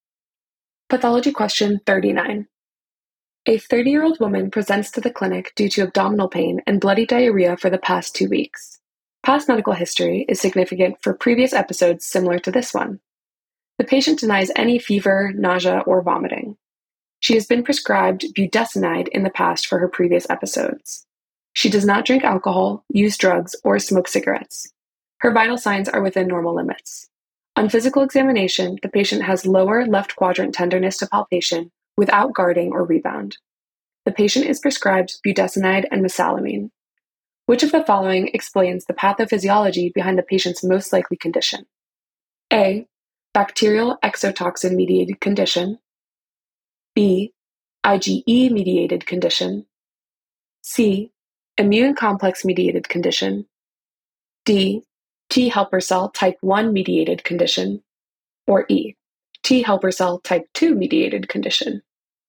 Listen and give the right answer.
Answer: The correct answer is E, T helper cell type 2 mediated condition.